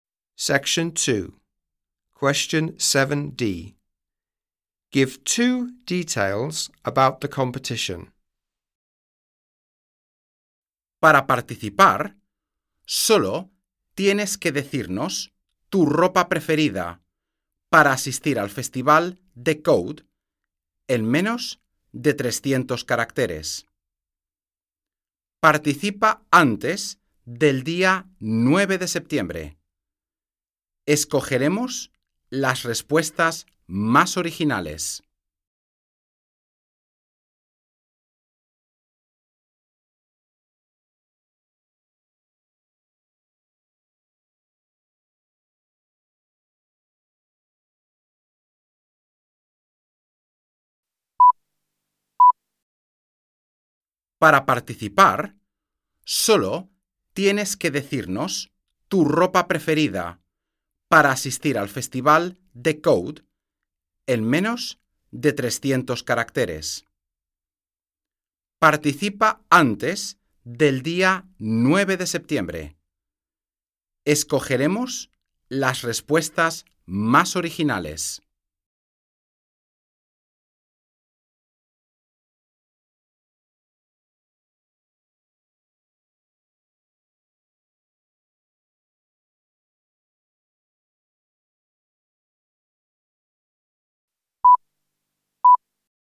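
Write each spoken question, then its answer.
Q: Give two details about the competition.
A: Describe your favourite clothes to wear to the festival in under 300 characters; enter before 9 September; the most original answers are chosen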